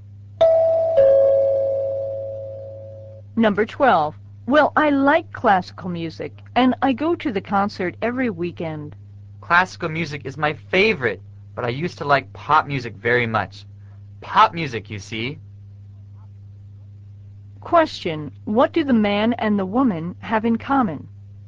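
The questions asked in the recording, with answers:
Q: what do the man and the woman have in common?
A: They both like classical music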